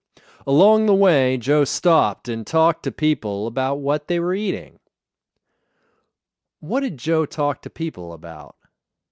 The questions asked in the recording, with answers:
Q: What did Joe talk to people about?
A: Joe talked to people about what they were eating.